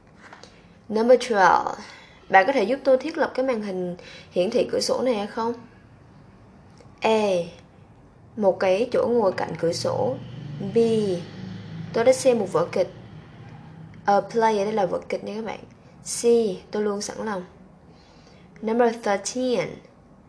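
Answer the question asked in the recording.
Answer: C: Tôi luôn sẵn lòng.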